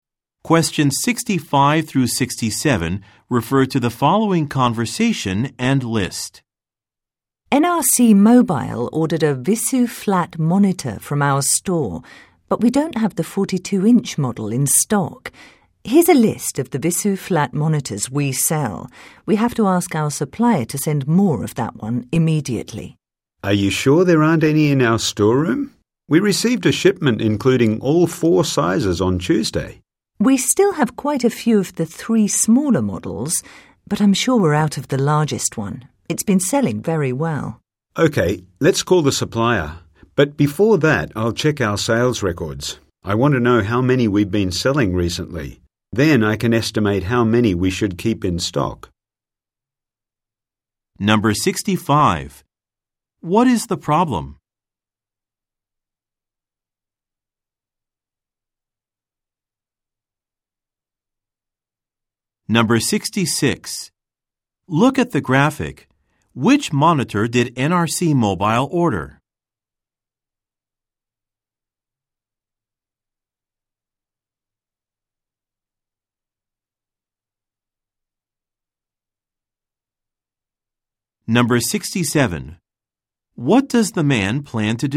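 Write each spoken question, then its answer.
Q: What is the problem?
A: The 42-inch Visu flat monitor that was ordered is out of stock.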